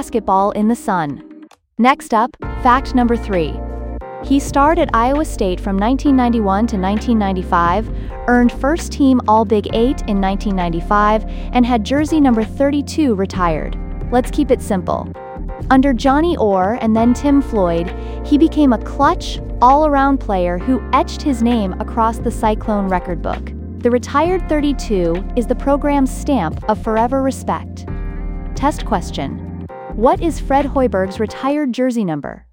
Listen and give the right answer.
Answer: Correct answer, 32.